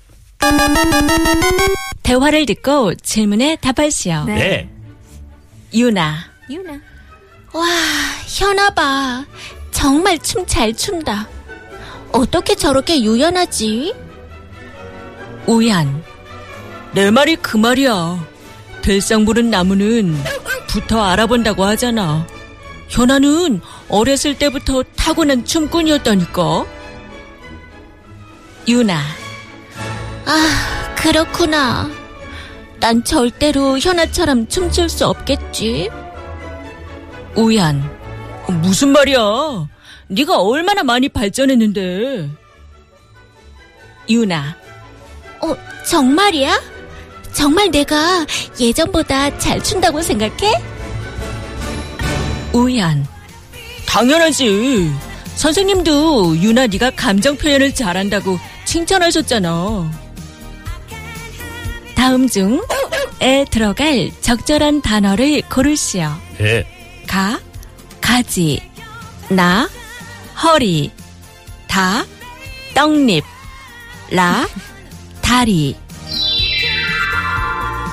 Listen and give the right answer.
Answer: Cotyledon.